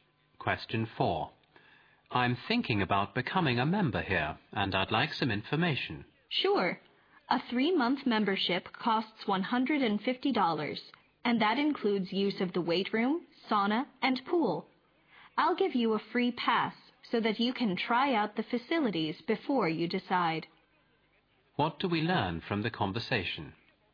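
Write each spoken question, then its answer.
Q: What do we learn from the conversation?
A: The man can use a free pass to try out the facilities before he decides whether to join.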